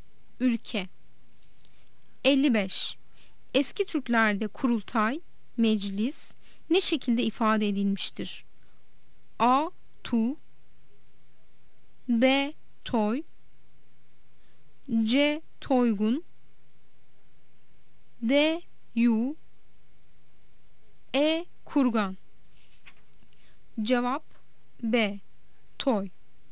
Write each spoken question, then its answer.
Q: Eski Türklerde kurultay, meclis ne şekilde ifade edilmiştir?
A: Cevap B. Toy.